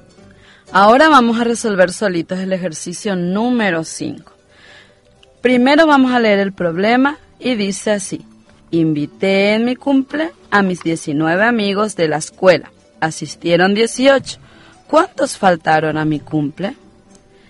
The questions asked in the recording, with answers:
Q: ¿Cuántos faltaron a mi cumple?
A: Faltó un niño.